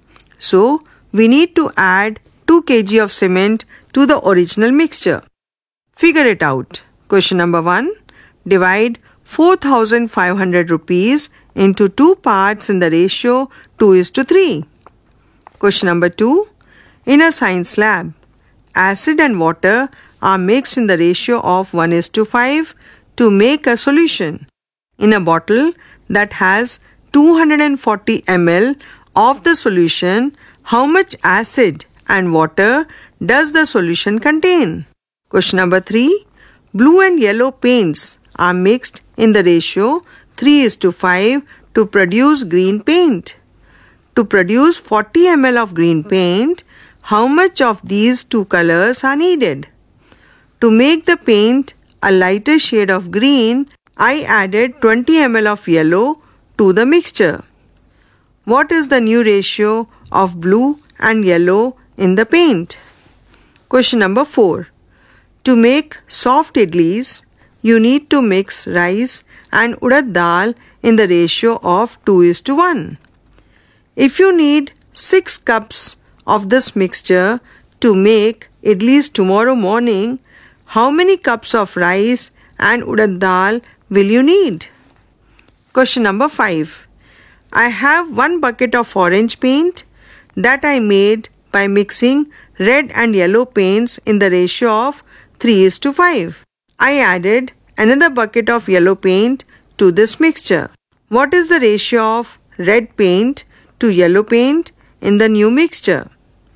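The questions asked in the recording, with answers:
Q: Divide 4,500 rupees into 2 parts in the ratio 2:3.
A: 1,800 rupees and 2,700 rupees

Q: In a bottle that has 240 ml of the solution, how much acid and water does the solution contain?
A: 40 ml acid and 200 ml water

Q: To produce 40 ml of green paint, how much of these two colors are needed?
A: 15 ml blue and 25 ml yellow

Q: What is the new ratio of blue and yellow in the paint?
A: 1:3

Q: If you need 6 cups of this mixture to make idlis tomorrow morning, how many cups of rice and urad dal will you need?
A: 4 cups rice and 2 cups urad dal

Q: What is the ratio of red paint to yellow paint in the new mixture?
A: 3:13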